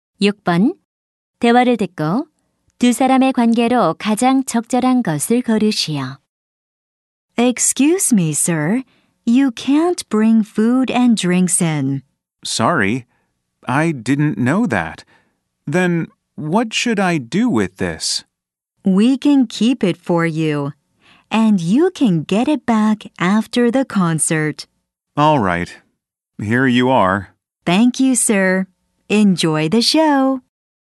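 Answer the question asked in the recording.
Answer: 공연장 직원 - 관객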